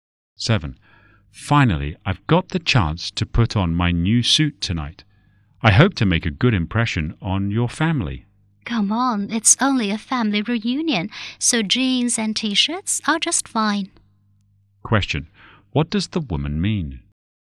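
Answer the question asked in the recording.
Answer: He doesn't need to dress formally; casual clothes are fine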